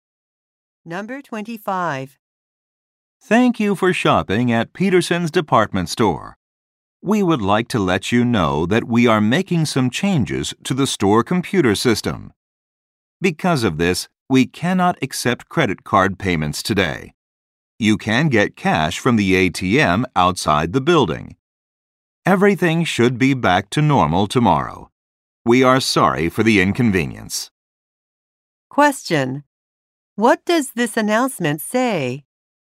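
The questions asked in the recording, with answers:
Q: What does this announcement say?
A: Credit cards cannot be used today.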